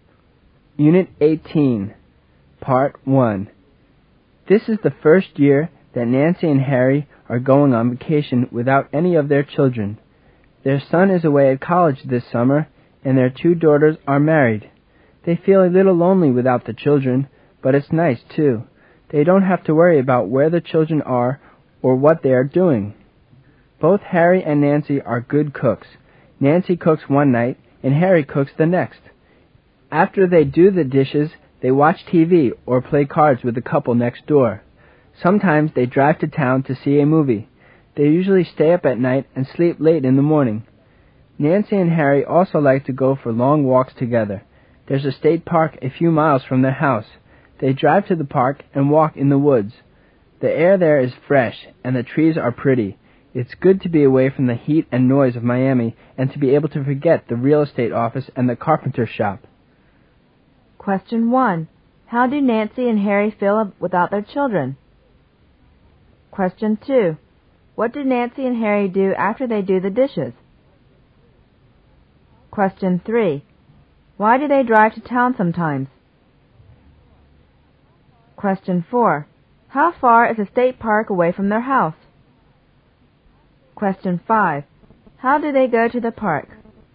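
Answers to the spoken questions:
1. A little lonely, but it's nice too
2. Watch TV or play cards with the couple next door
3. To see a movie
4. A few miles
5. They drive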